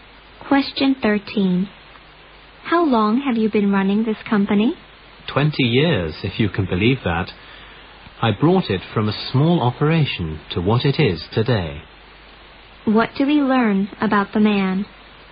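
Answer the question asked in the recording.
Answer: He has run the company for 20 years and built it up from a small operation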